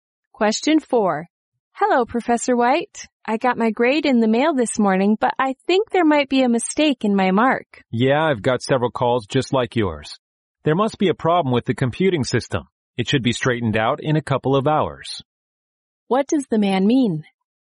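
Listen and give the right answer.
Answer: A computer problem caused the grade errors, and it will be fixed soon.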